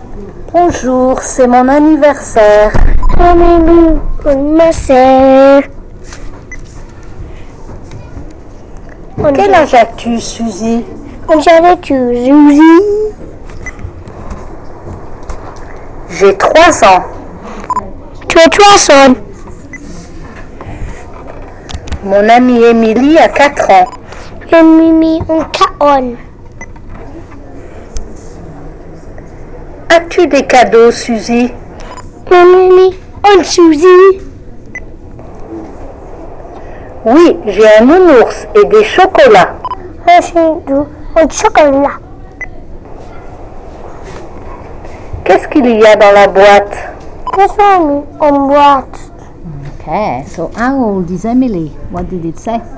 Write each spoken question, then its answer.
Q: Ok, so how old is Emily? What did it say?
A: It says, mon amie Emily a 4 ans.